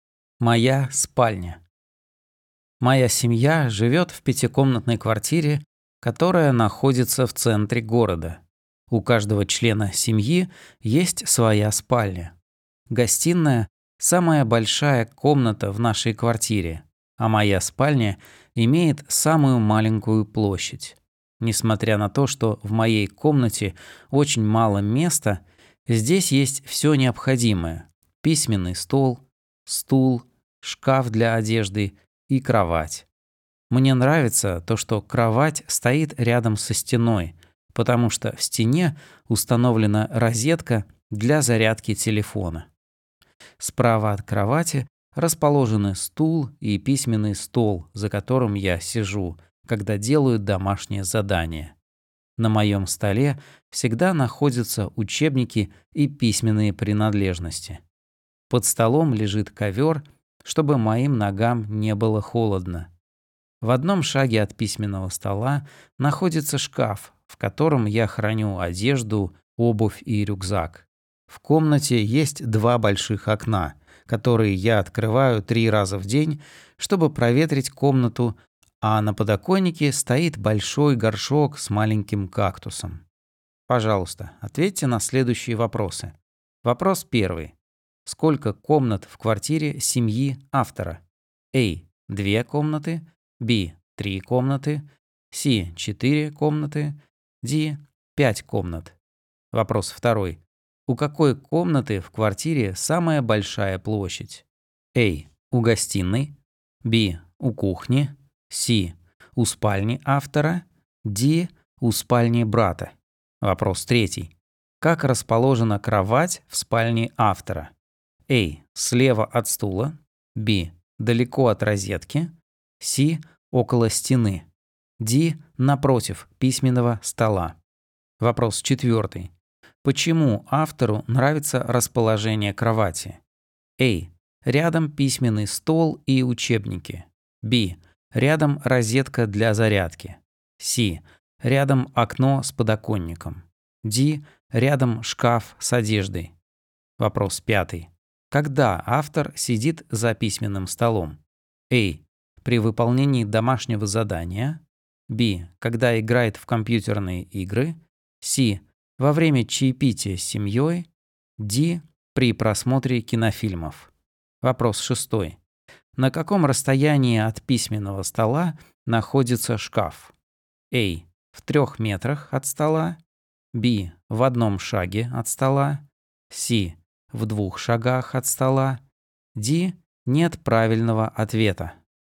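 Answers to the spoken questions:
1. D: 5 комнат
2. A: У гостиной
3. C: Около стены
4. B: Рядом розетка для зарядки
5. A: При выполнении домашнего задания
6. B: В 1 шаге от стола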